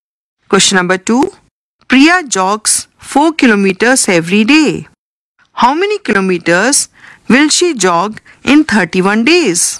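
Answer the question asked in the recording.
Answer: 124 km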